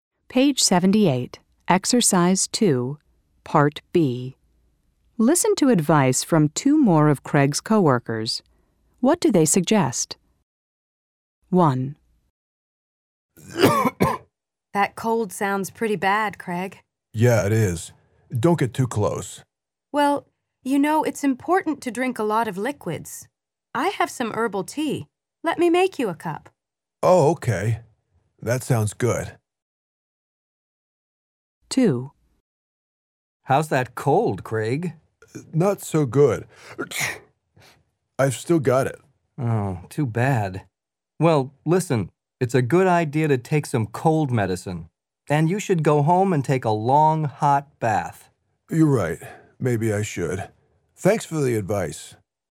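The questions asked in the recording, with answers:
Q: What do they suggest?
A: Drink a lot of liquids, such as herbal tea

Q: What do they suggest?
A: Take some cold medicine and go home and take a long, hot bath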